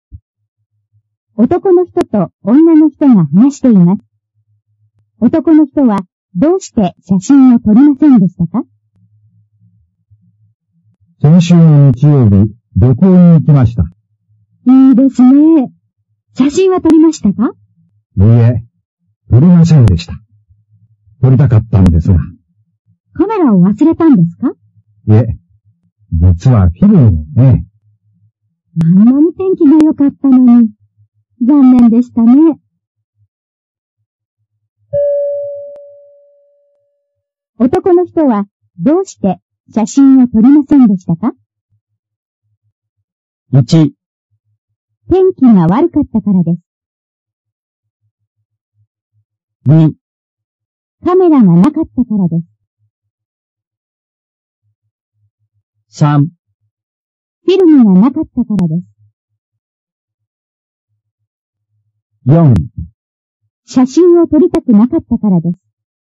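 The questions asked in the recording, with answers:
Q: 男の人はどうして写真を撮りませんでしたか?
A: 3: フィルムがなかったからです。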